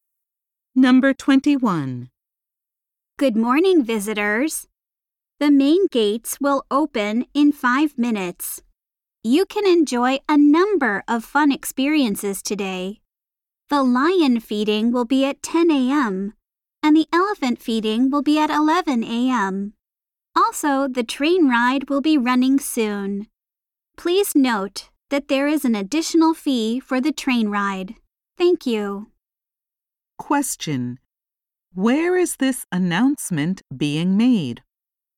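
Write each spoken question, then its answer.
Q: Where is this announcement being made?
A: At a zoo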